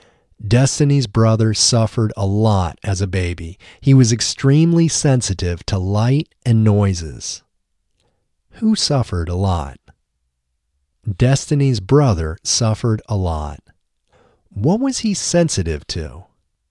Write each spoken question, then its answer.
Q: What was he sensitive to?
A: He was sensitive to light and noises.